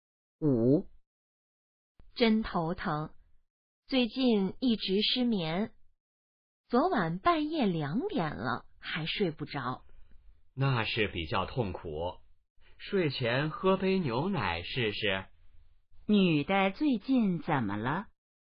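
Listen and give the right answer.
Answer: 失眠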